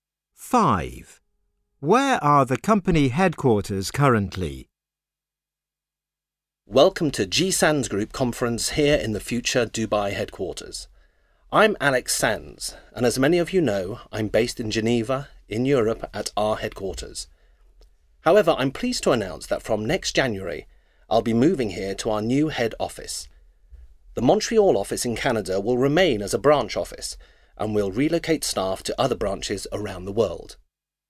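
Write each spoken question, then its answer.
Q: Where are the company headquarters currently?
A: Geneva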